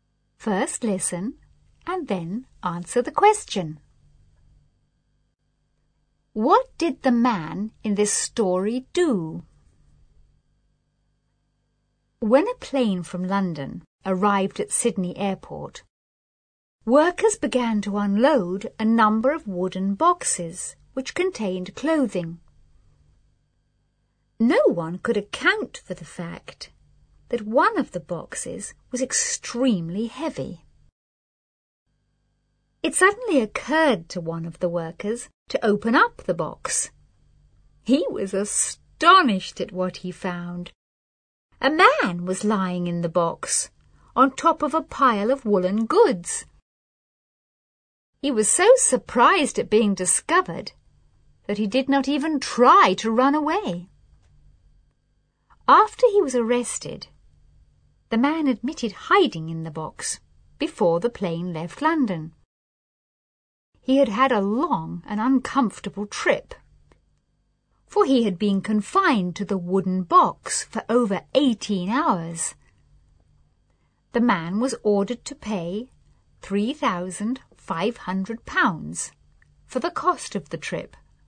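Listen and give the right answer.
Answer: He hid in a wooden box on a plane from London to Sydney to travel without a ticket.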